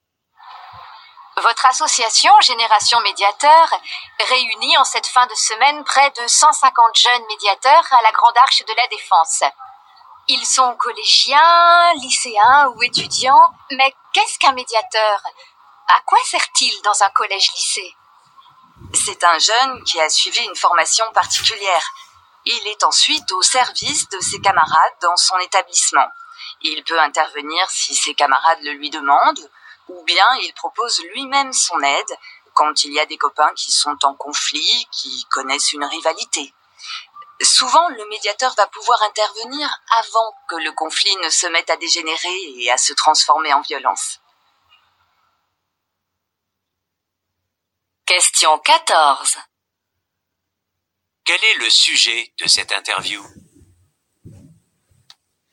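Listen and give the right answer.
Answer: Les jeunes médiateurs dans les établissements scolaires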